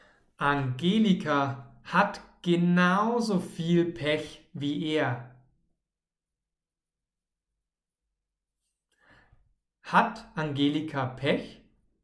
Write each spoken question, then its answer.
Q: Hat Angelika Pech?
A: Ja, sie hat Pech.